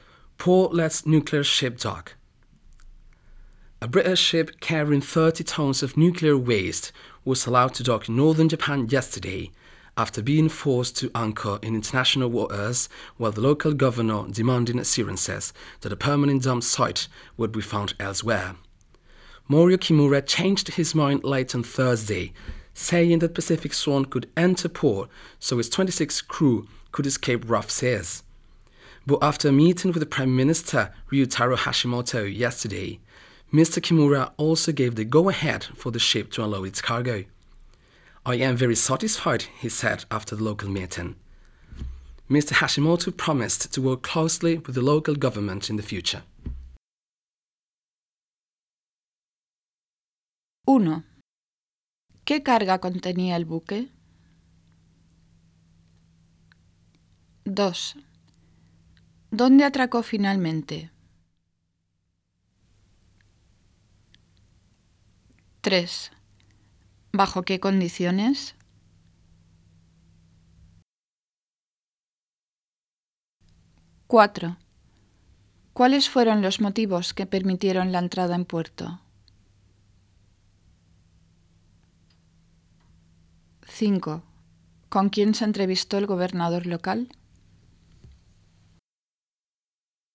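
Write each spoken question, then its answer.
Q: ¿Qué carga contenía el buque?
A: 30 toneladas de residuos nucleares

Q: ¿Dónde atracó finalmente?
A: En el norte de Japón

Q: ¿Cuáles fueron los motivos que permitieron la entrada en puerto?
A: Que sus 26 tripulantes pudieran escapar del mar agitado

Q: ¿Con quién se entrevistó el gobernador local?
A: Con el primer ministro Ryutaro Hashimoto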